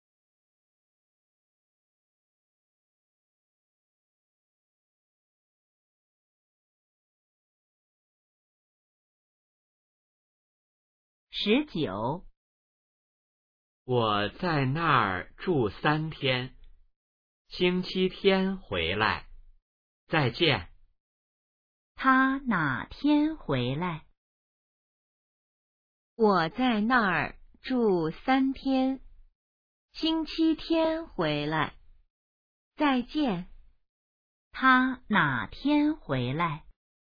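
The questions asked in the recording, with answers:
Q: 他哪天回来?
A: 星期天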